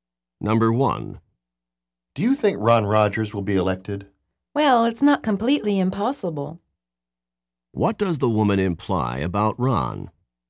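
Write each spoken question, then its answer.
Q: What does the woman imply about Ron?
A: There is a small chance he will be elected.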